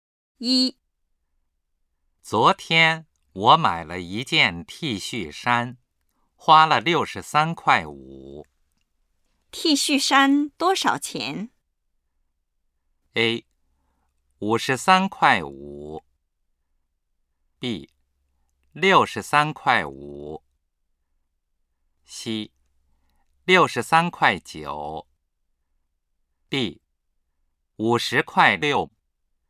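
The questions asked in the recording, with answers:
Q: T 恤衫多少钱?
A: B: 63.5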